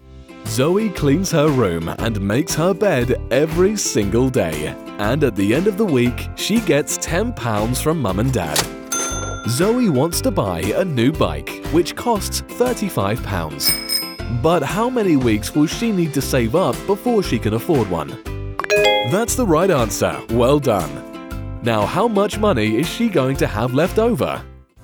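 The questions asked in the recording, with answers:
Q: But how many weeks will she need to save up before she can afford one?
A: 4 weeks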